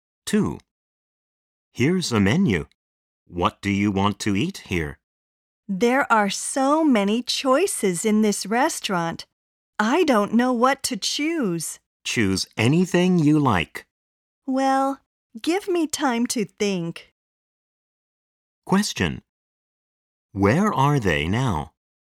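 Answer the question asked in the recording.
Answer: In a restaurant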